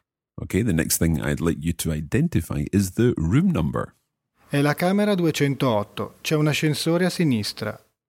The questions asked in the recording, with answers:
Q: Okay, the next thing I'd like you to identify is the room number.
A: So the room number is 208.